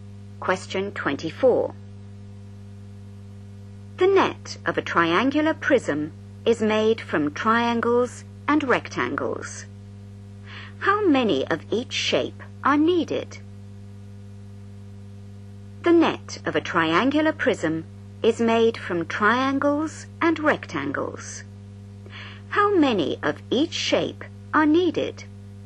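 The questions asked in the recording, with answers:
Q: How many of each shape are needed?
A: 2 triangles and 3 rectangles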